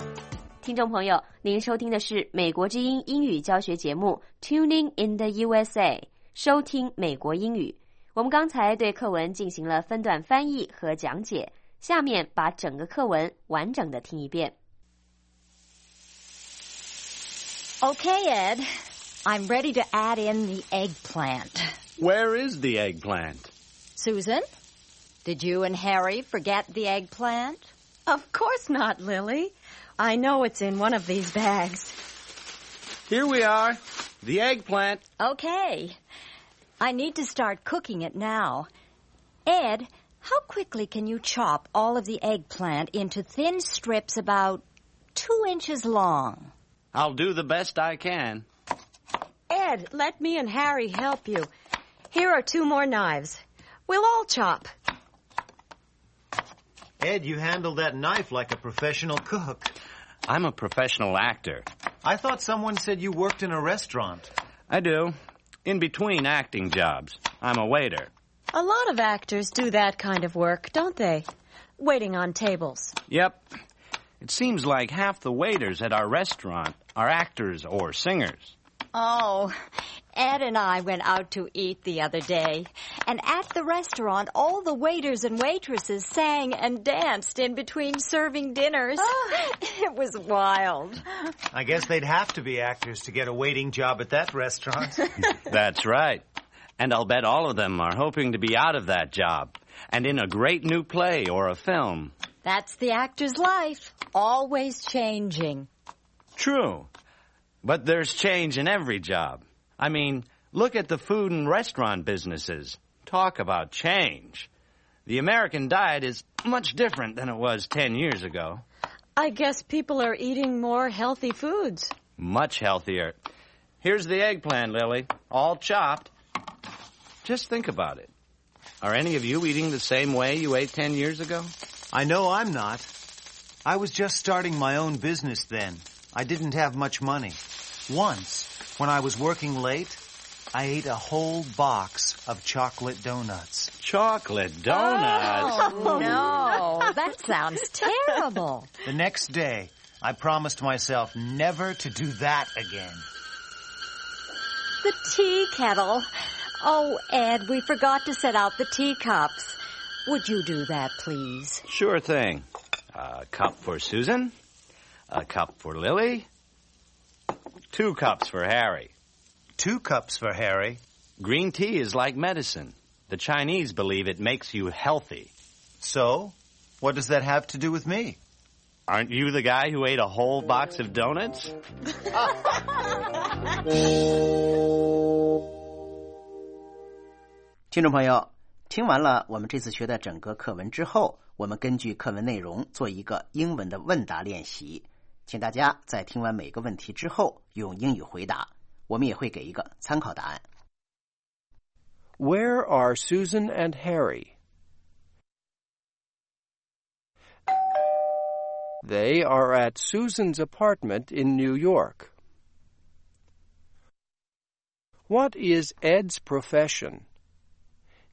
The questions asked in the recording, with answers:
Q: What is Ed's profession?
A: He is an actor and also a waiter in a restaurant.